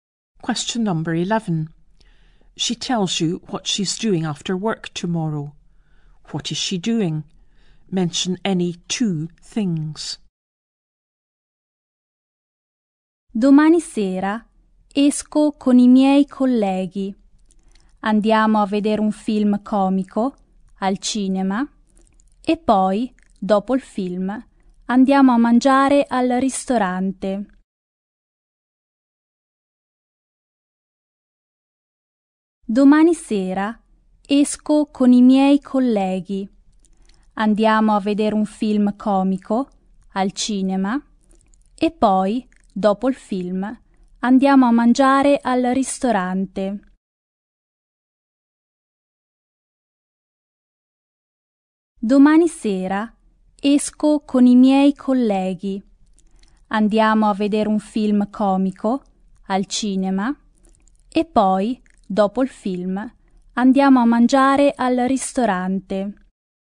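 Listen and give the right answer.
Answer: Going out with colleagues; seeing a comedy film at the cinema; eating at a restaurant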